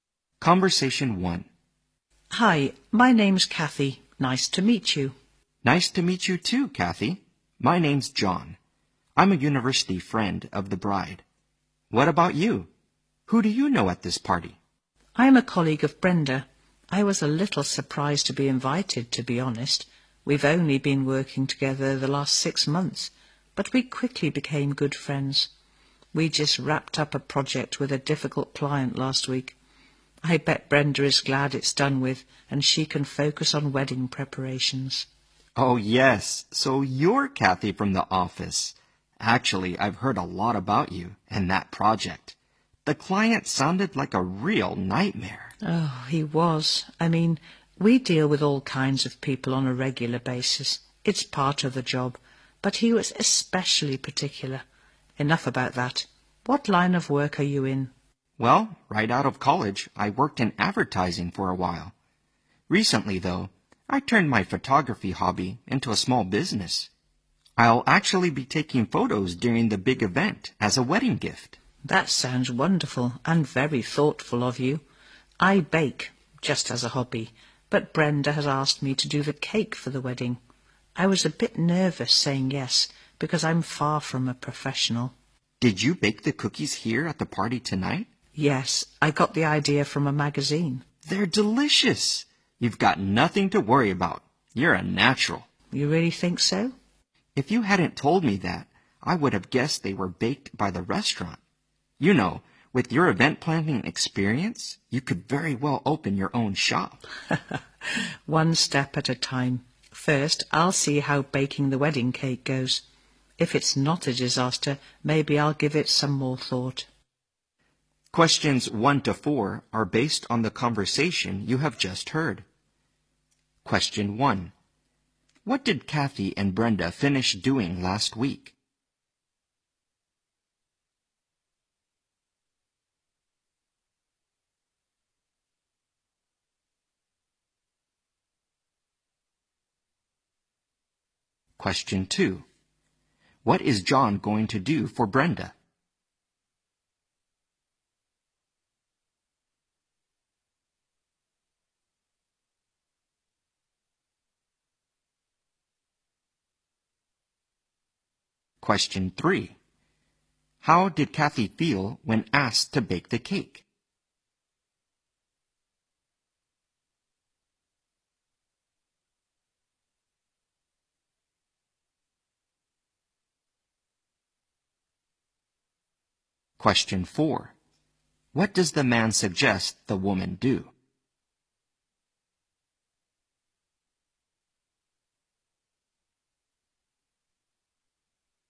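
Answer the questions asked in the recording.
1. A project with a difficult client
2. Take photos at her wedding as a gift
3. Nervous
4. Open her own shop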